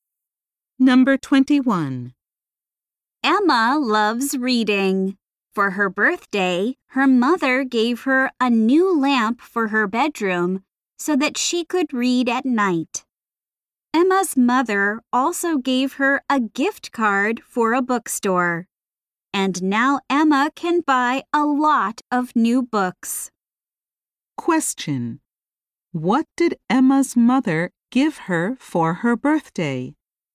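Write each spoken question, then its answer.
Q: What did Emma's mother give her for her birthday?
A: A new lamp and a bookstore gift card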